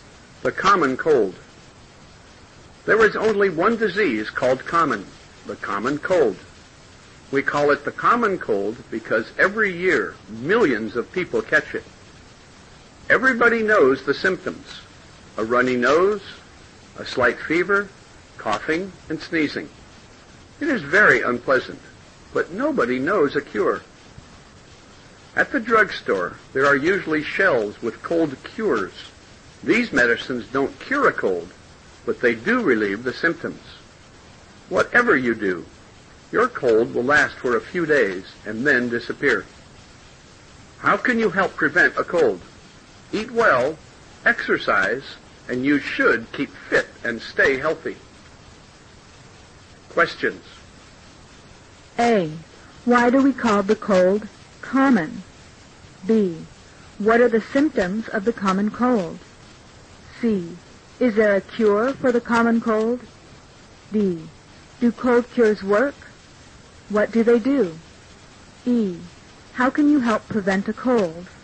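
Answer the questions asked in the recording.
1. Because every year millions of people catch it.
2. A runny nose, a slight fever, coughing, and sneezing.
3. No, nobody knows a cure.
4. No, they don't cure a cold, but they relieve the symptoms.
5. Eat well and exercise to keep fit and stay healthy.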